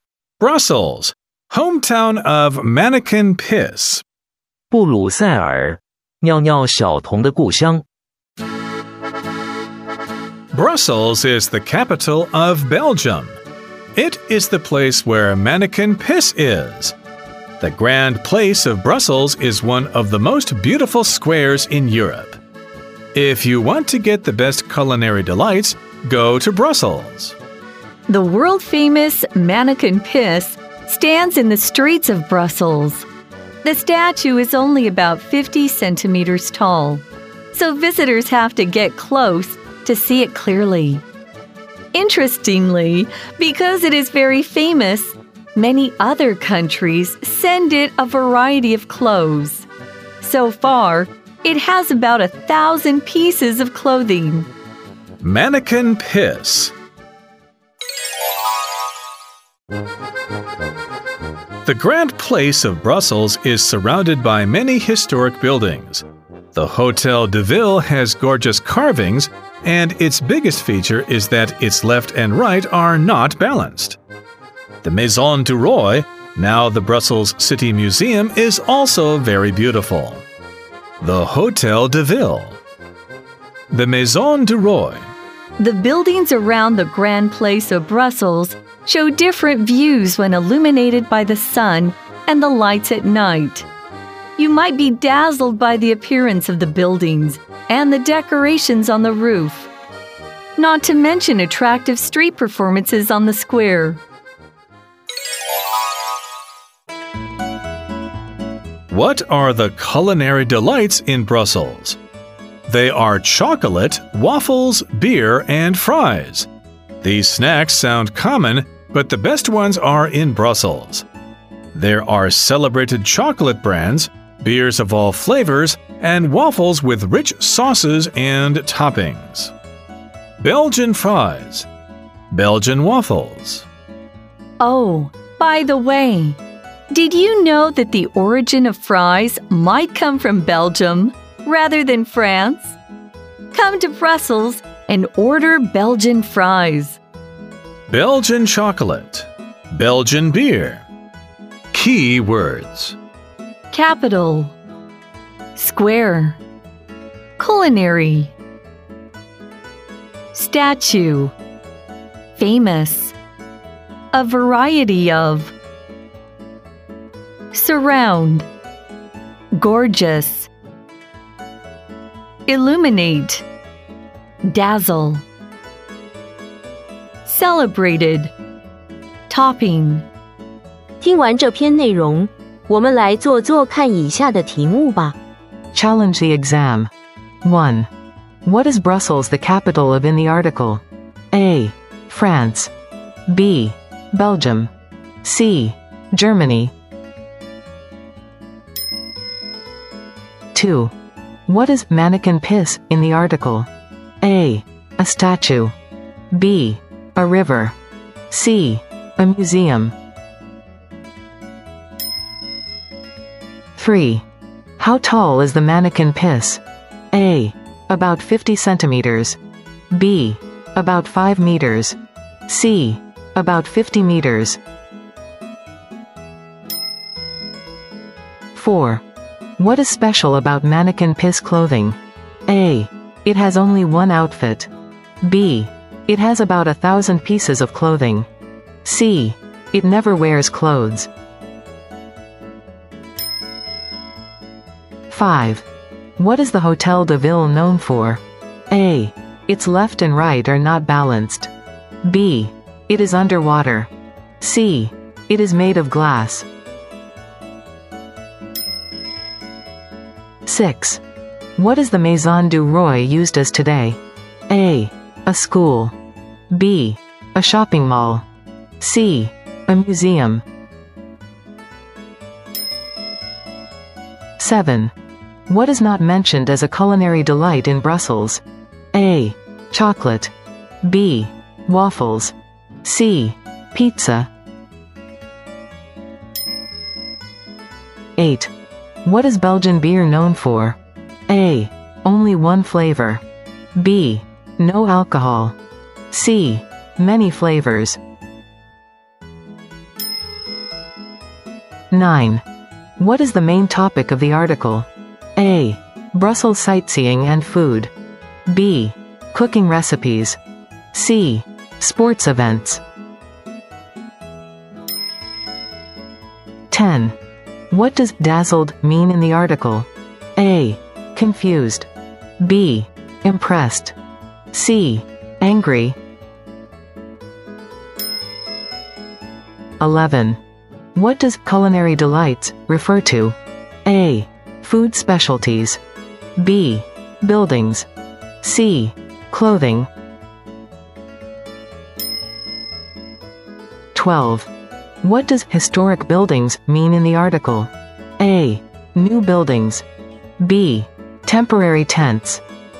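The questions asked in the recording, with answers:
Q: What is Brussels the capital of in the article?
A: B: Belgium

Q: What is mannequin piss in the article?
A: A: A statue

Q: How tall is the mannequin piss?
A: A: About 50 centimeters

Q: What is special about mannequin piss clothing?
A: B: It has about 1,000 pieces of clothing

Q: What is the Hotel de Ville known for?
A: A: Its left and right are not balanced

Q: What is the Maison du Roi used as today?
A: C: A museum

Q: What is not mentioned as a culinary delight in Brussels?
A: C: Pizza

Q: What is Belgian beer known for?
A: C: Many flavors

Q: What is the main topic of the article?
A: A: Brussels sightseeing and food

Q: What does dazzled mean in the article?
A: B: Impressed

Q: What does culinary delights refer to?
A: A: Food specialties

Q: What does historic buildings mean in the article?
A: C: Old important buildings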